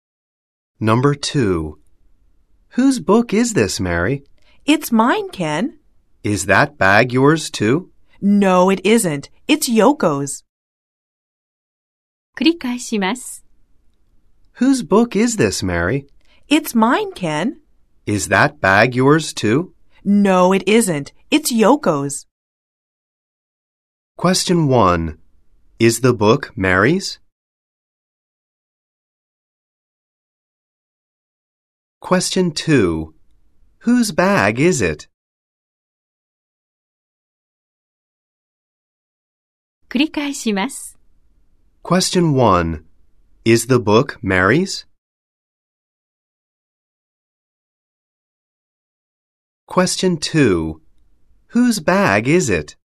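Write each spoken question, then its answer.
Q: Is the book Mary's?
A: Yes, it is.

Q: Whose bag is it?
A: It's Yoko's.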